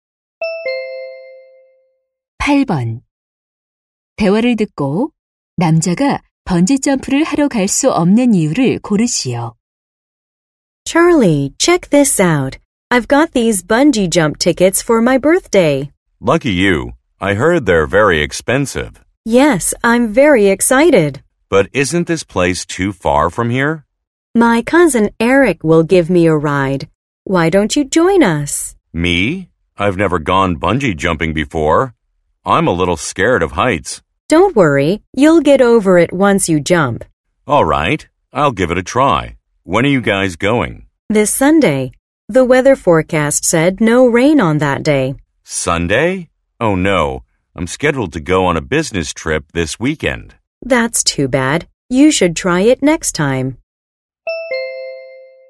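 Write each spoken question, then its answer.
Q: 대화를 듣고 남자가 번지점프를 하러 갈 수 없는 이유를 고르시오.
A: 이번 주말에 출장이 잡혀 있어서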